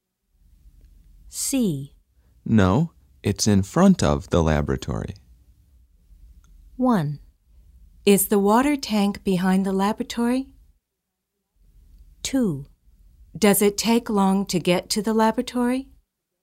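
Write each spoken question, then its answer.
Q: No, it's in front of the laboratory.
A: 1: Is the water tank behind the laboratory?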